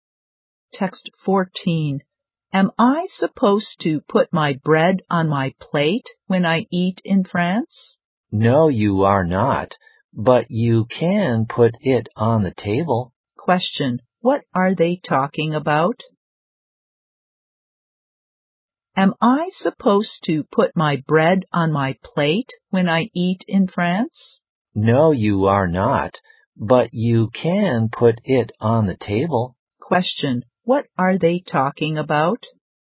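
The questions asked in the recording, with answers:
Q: What are they talking about?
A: Table manners in France (where to put bread when eating).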